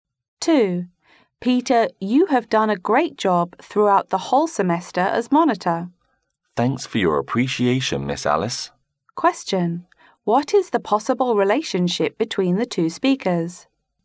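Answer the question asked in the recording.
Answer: Teacher and student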